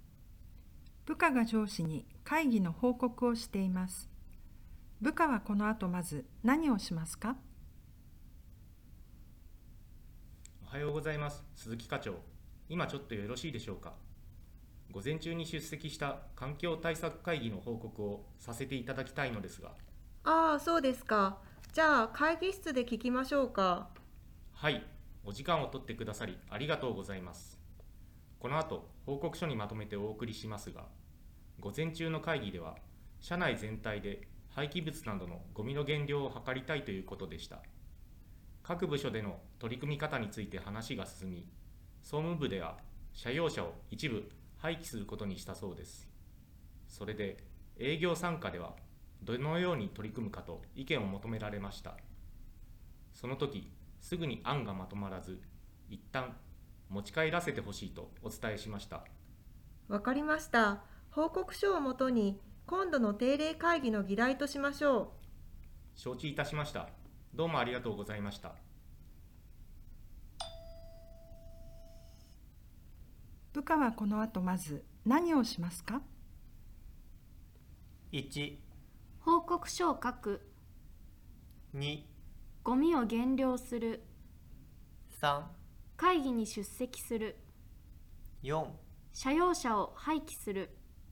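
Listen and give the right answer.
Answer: 1: 報告書を書く。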